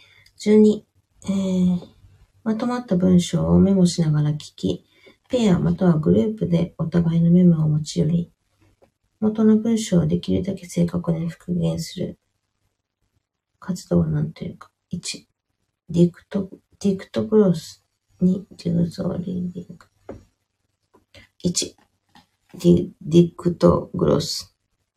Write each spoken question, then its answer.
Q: まとまった文章をメモしながら聞き、ペアまたはグループでお互いのメモを持ち寄り、元の文章をできるだけ正確に復元する活動を何というか。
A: 1、ディクトグロス。